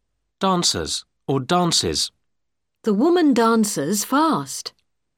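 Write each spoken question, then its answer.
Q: Dancers or dances.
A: dances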